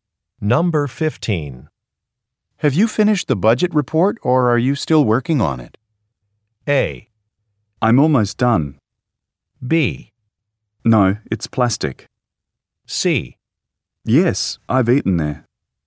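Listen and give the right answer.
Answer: A: I'm almost done.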